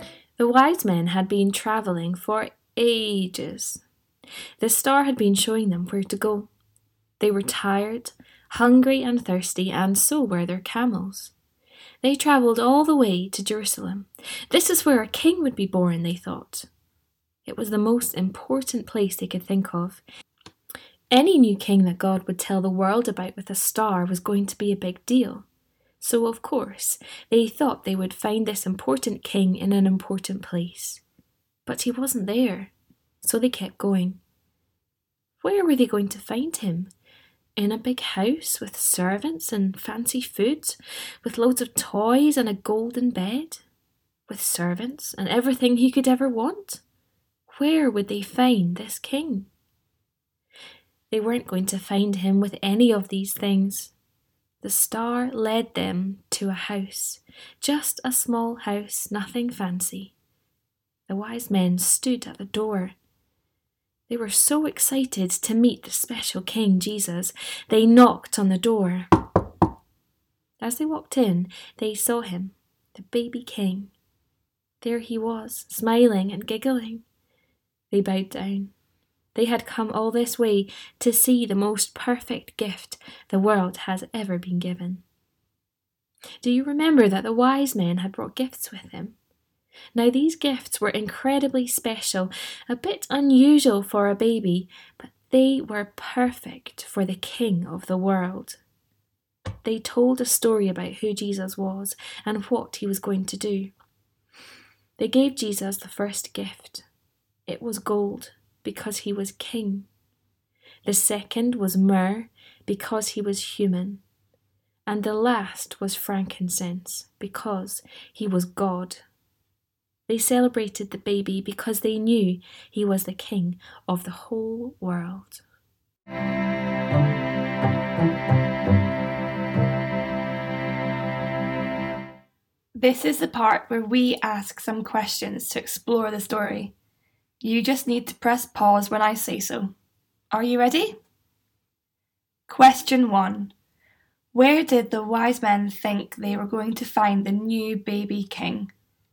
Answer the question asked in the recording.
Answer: They were expecting to find the greatest king ever born in a beautiful palace full of yummy food, beautiful things, and everything he could ever want.